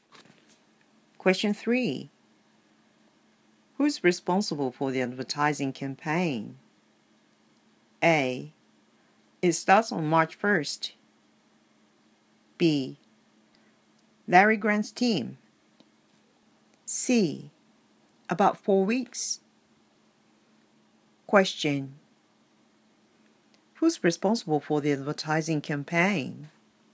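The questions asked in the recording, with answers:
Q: Who's responsible for the advertising campaign?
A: B: Larry Grant's team.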